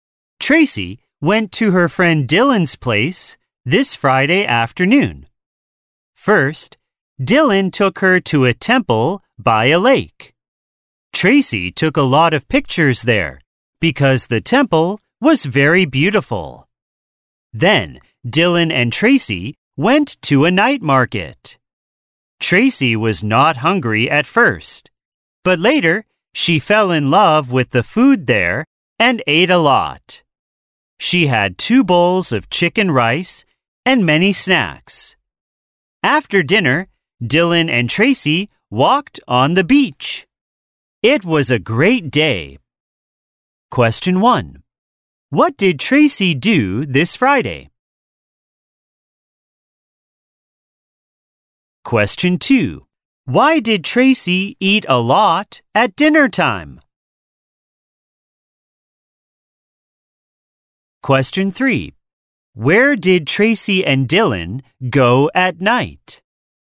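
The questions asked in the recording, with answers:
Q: Why did Tracy eat a lot at dinner time?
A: She fell in love with the food at the night market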